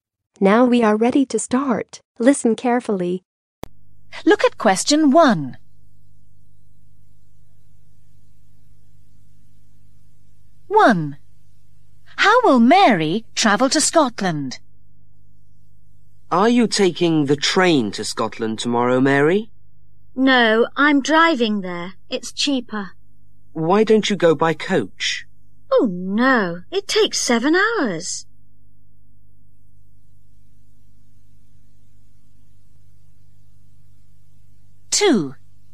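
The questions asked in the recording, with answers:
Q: How will Mary travel to Scotland?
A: by car (she is driving)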